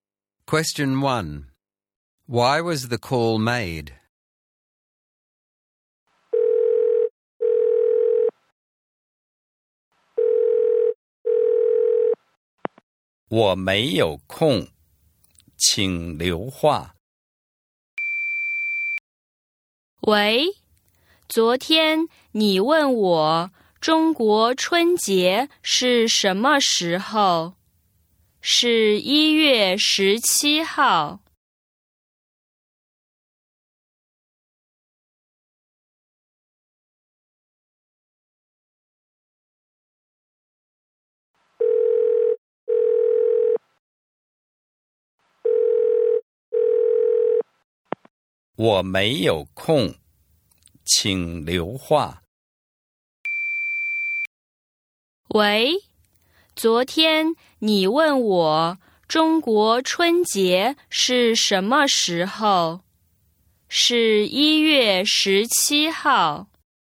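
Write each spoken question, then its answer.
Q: Why was the call made?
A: To answer the question asked yesterday about when Chinese New Year (Spring Festival) is: it is on 17 January.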